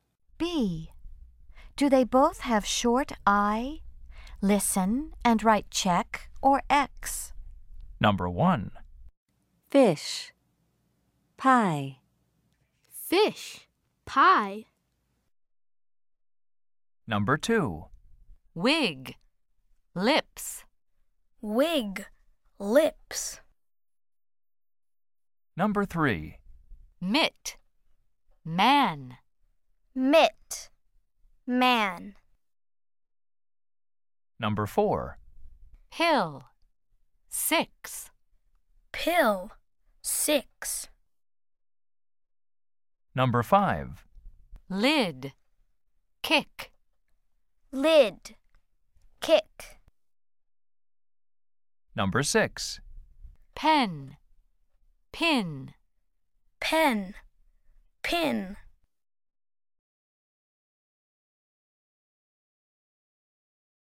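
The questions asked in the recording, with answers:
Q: Do they both have short I?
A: No (fish, pie)

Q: Do they both have short I?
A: Yes (wig, lips)

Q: Do they both have short I?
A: No (mitt, man)

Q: Do they both have short I?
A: Yes (pill, six)

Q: Do they both have short I?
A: Yes (lid, kick)

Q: Do they both have short I?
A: No (pen, pin)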